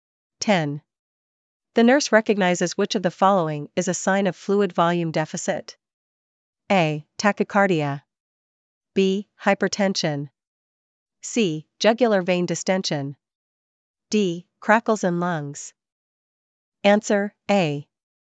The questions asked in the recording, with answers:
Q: The nurse recognizes which of the following is a sign of fluid volume deficit.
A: A. Tachycardia.